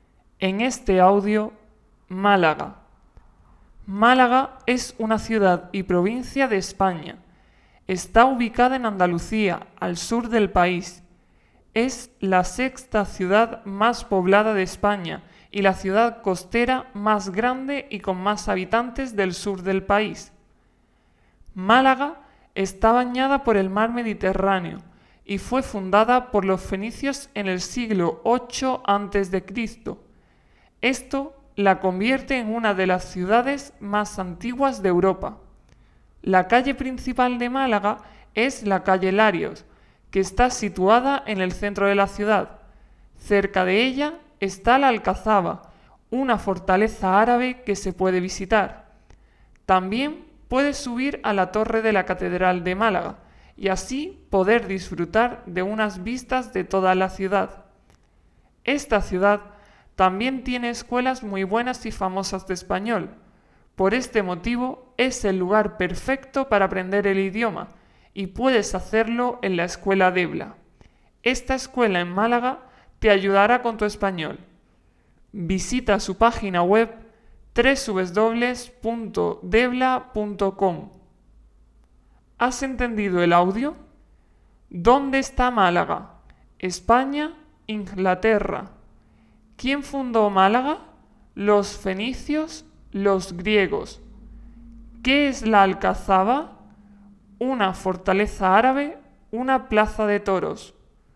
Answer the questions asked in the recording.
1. España
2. los fenicios
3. una fortaleza árabe